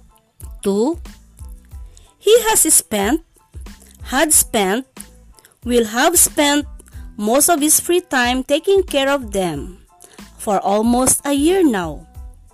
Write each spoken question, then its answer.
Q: He has spent, had spent, will have spent most of his free time taking care of them for almost a year now.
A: Has spent is right.